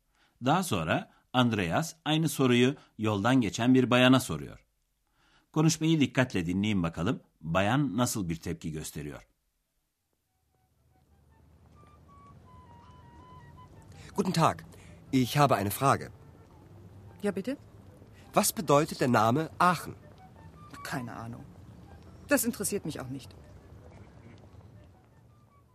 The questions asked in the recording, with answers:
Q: Konuşmayı dikkatle dinleyin bakalım bayan nasıl bir tepki gösteriyor.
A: Bayan hiçbir fikrim yok diyor.